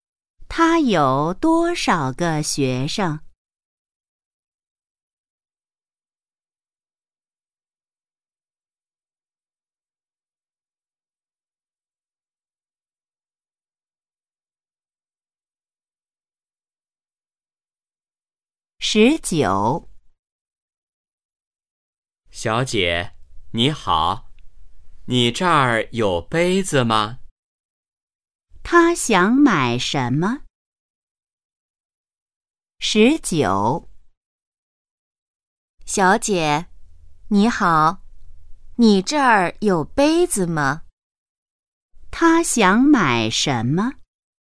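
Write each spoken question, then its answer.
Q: 他想买什么?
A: 杯子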